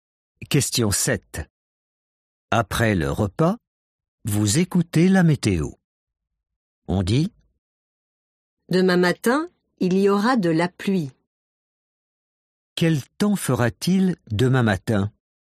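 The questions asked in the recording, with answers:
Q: Quel temps fera-t-il demain matin ?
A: de la pluie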